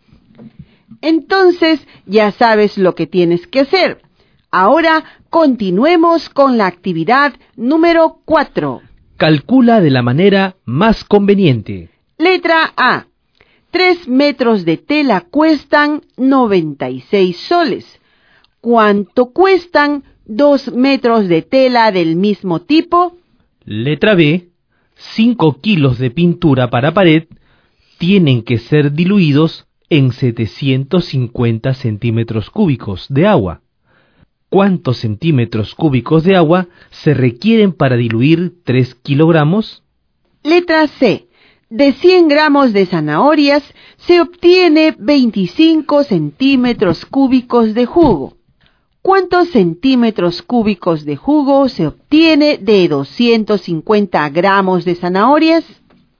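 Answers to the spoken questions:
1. 64 soles
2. 450 centímetros cúbicos
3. 62,5 centímetros cúbicos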